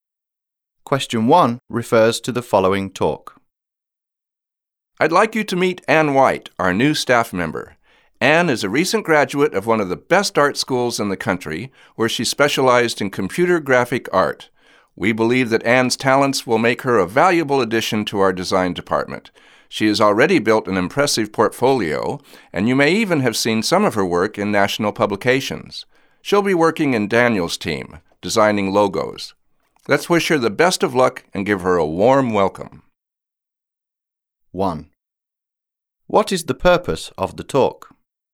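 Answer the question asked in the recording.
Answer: To introduce a new staff member, Anne White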